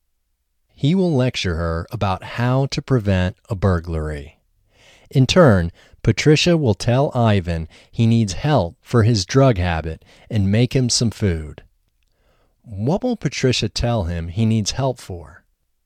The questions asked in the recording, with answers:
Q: What will Patricia tell him he needs help for?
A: Patricia will tell him he needs help for his drug habit.